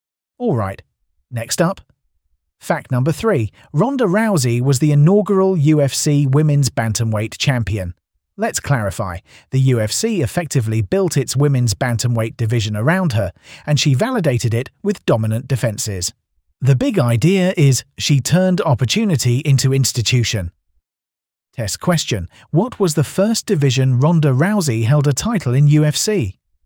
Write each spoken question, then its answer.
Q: what was the first division Ronda Rousey held a title in UFC?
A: Correct answer, bantamweight.